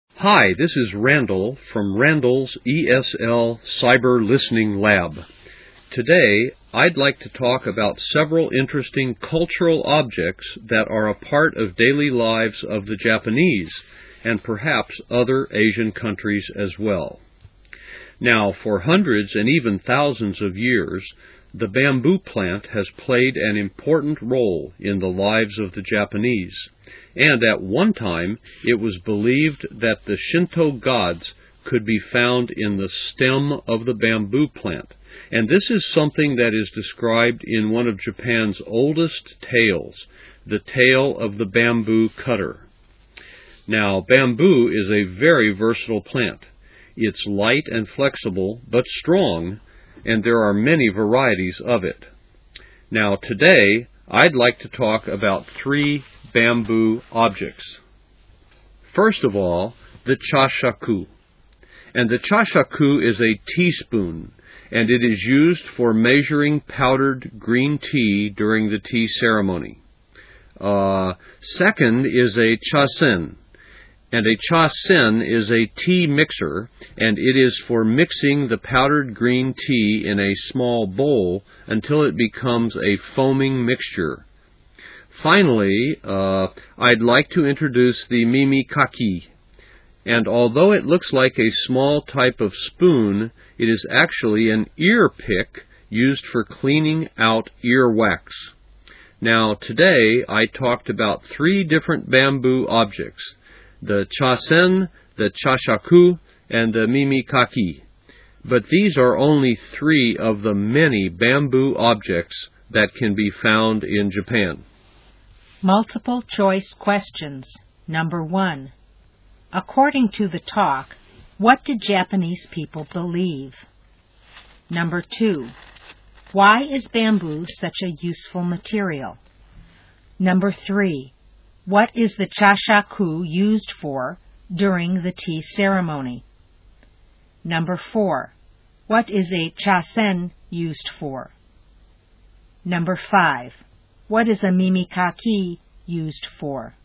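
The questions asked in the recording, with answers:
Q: According to the talk, what did Japanese people believe?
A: That Shinto gods could be found in the stem of the bamboo plant

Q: Why is bamboo such a useful material?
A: It's light and flexible, but strong

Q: What is the chashaku used for during the tea ceremony?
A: Measuring powdered green tea

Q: What is a chasen used for?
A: Mixing powdered green tea in a small bowl until it foams

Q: What is a mimikaki used for?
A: Cleaning out earwax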